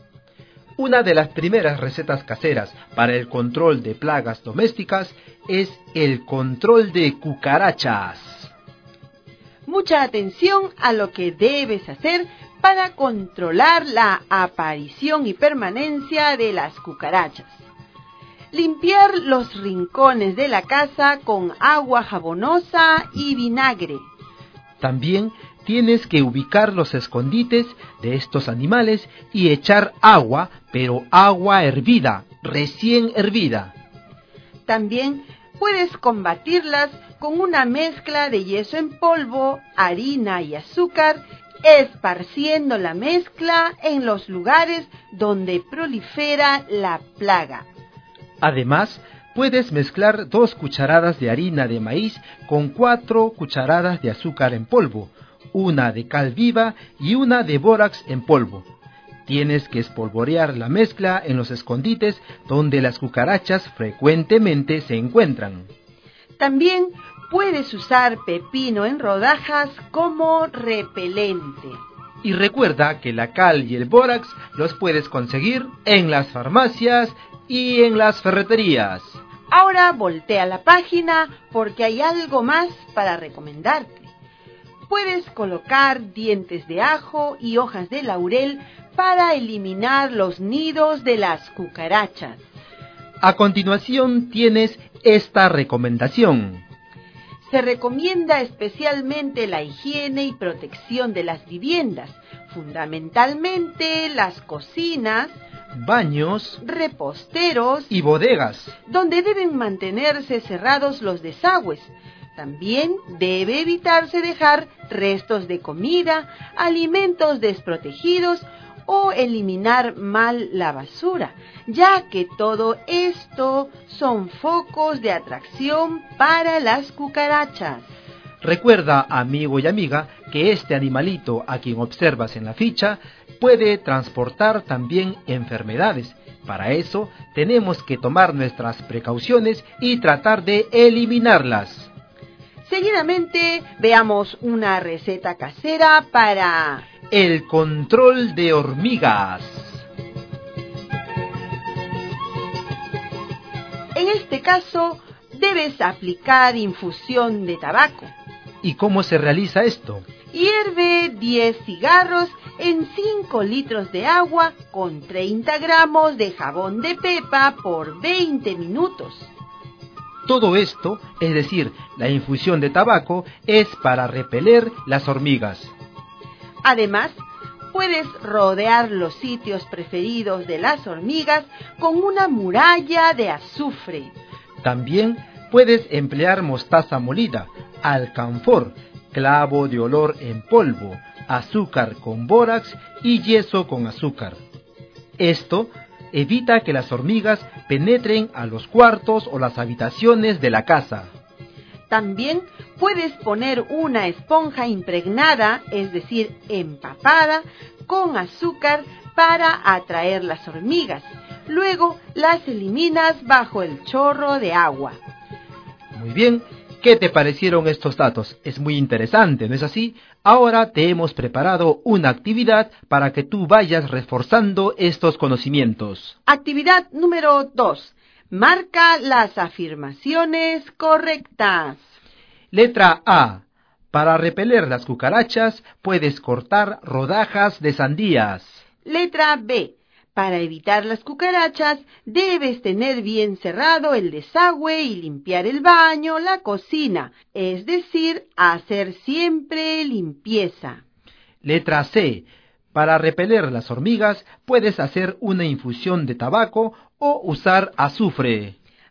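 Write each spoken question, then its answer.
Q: Marca las afirmaciones correctas.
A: B y C: cerrar el desagüe y hacer limpieza; infusión de tabaco o azufre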